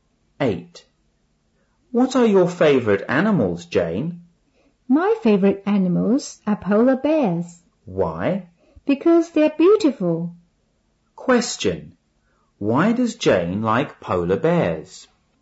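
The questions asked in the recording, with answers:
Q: Why does Jane like polar bears?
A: Because they're beautiful.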